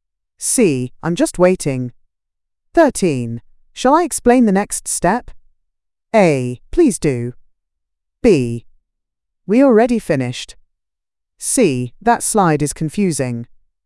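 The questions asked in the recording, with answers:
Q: Shall I explain the next step?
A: A: Please do.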